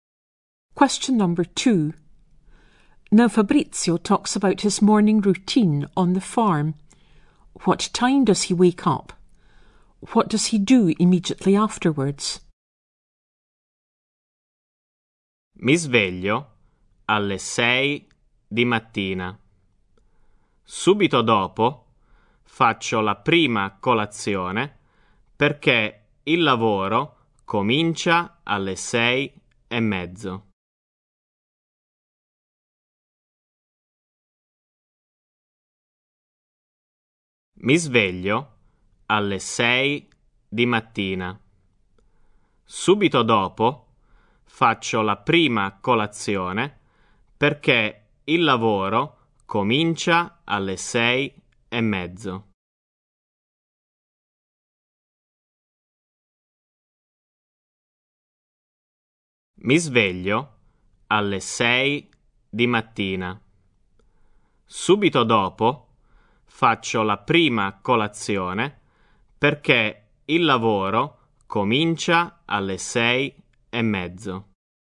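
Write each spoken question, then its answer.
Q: What time does he wake up?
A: At 6 a.m.

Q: What does he do immediately afterwards?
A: He has breakfast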